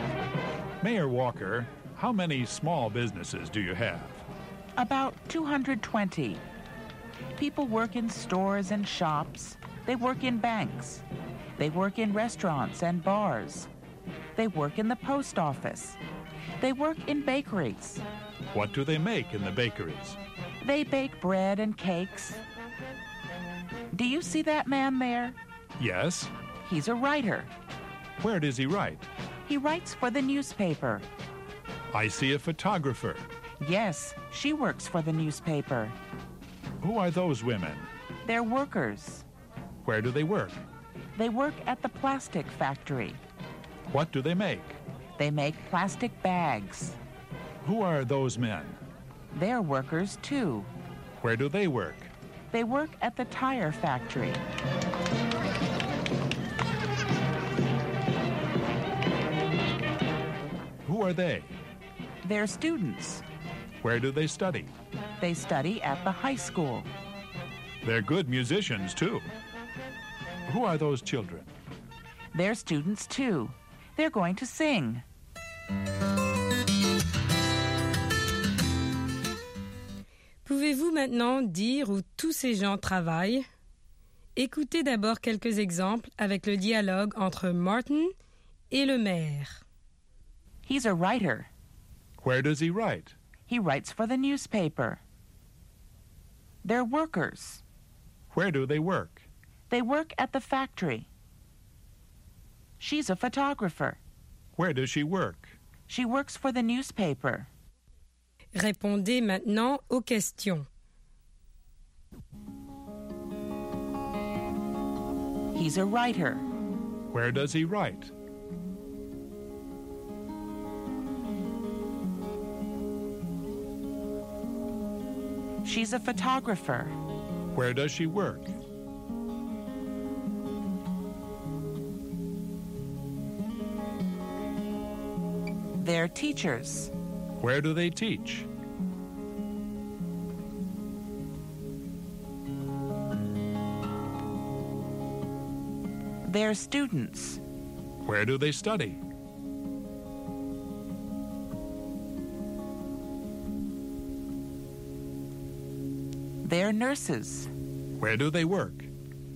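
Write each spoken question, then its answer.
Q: Where does he write?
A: He writes for the newspaper.

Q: Where does she work?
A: She works for the newspaper.

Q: Where do they study?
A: They study at the high school.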